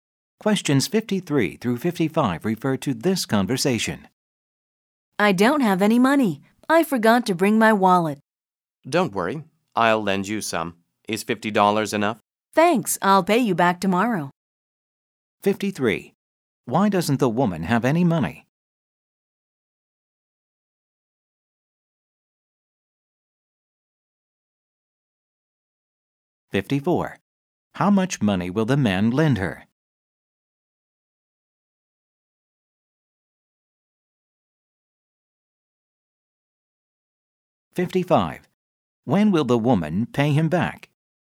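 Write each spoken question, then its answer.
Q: Why doesn't the woman have any money?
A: She forgot her wallet

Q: How much money will the man lend her?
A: $50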